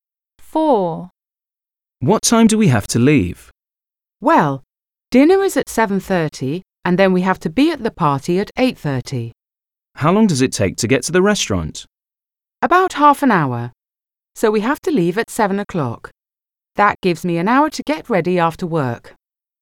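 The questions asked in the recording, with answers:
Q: What time do we have to leave?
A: 7 o'clock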